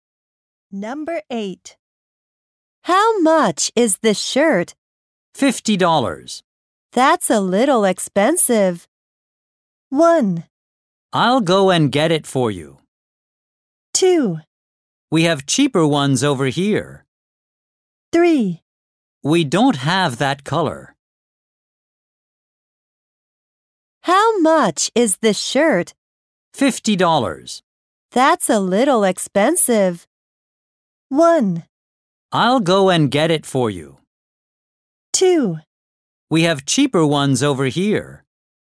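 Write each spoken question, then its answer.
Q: That's a little expensive.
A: 2: We have cheaper ones over here.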